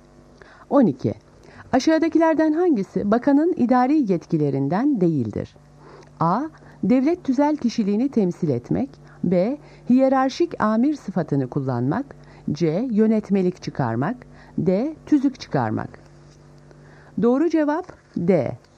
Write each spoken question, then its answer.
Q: Aşağıdakilerden hangisi bakanın idari yetkilerinden değildir?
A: Doğru cevap D. Yönetmelik tüzük çıkarmak.